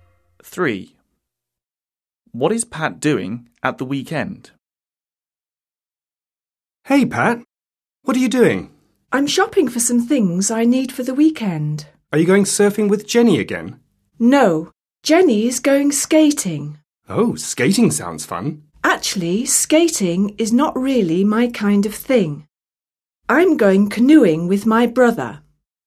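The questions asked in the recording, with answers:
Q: What is Pat doing at the weekend?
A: Going canoeing with his brother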